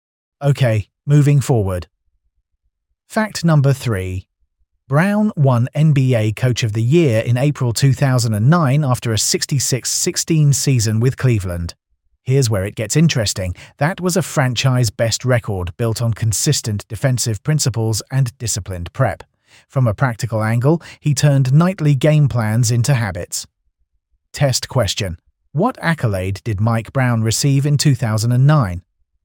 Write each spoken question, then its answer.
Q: What accolade did Mike Brown receive in 2009?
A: NBA Coach of the Year.